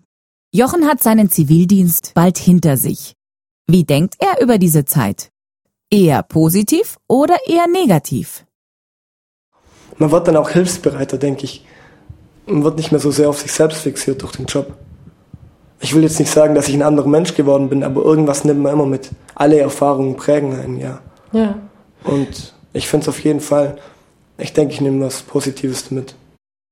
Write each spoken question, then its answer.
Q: Eher positiv oder eher negativ?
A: Jochen denkt positiv über diese Zeit.